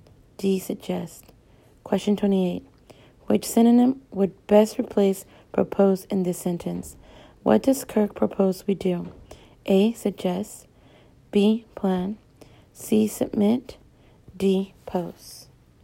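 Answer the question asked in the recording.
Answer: A: Suggest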